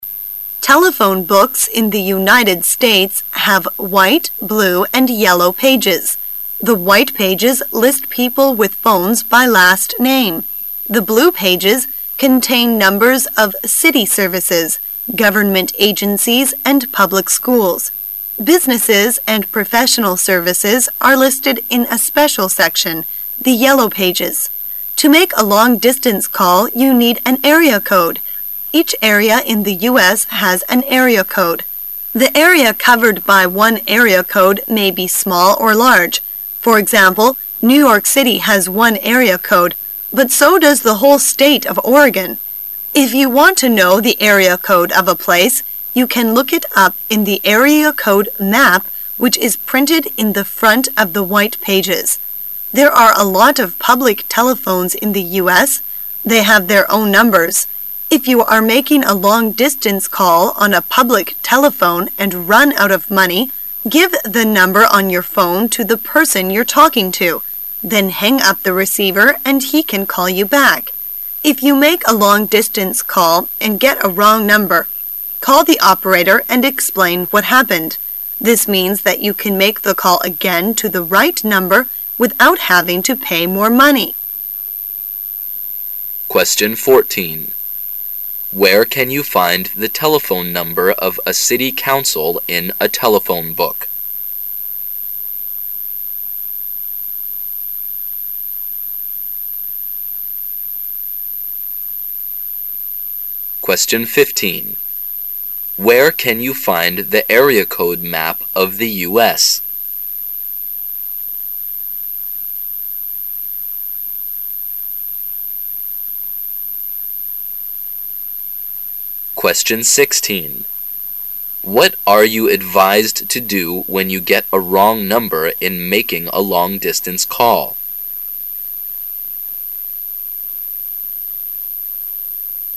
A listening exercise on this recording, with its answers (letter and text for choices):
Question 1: Where can you find the area code map of the U.S.?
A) Right after the white pages.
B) In the front of the white pages.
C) At the end of the telephone book.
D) On the first page of the telephone book;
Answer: B) In the front of the white pages.

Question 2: What are you advised to do when you get a wrong number in making a long distance call?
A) Check your number and call again.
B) Ask the operator to put you through.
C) Ask the operator what has happened.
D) Tell the operator what has happened.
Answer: D) Tell the operator what has happened.

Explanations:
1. 细节题。选项[B]符合题意,依据是听力材料中的If you want to know the area code of a place,...which is printed in the front of the white pages。这句话的前半部分正是题干,后半部分就是答案。
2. 细节题。选项[D]符合题意,依据是听力材料中的If you make a long distance call and...explain what happened.这句话的前半部分正是题干,后半部分就是答案所在。

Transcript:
[解析] 14-16 Telephone books in the Unites States have white, blue and yellow pages. The white pages list people with phones by last name. The blue pages contain numbers of city services, government agencies and public schools. Businesses and professional services are listed in a special section, the yellow pages. To make a long distance call, you need an area code. Each area in the U.S. The area covered by one area code may be small or large. For example, New York City has one area code. But so does the whole State of Oregon. If you want to know the area code of a place, you can look it up in the area code map which is printed in the front of the white pages. There are a lot of public telephones in the U.S. They have their own numbers. If you are making a long distance call on a public telephone and run out of money, give the number on your phone to the person 'you're talking to. Then hang up the receiver and he can call you back. If you make a long distance call and get a wrong number, call the operator and explain what happened. This means that you can make the call again to the right number without having to pay more money. 14.Where can you find the telephone number of a city council in a telephone book?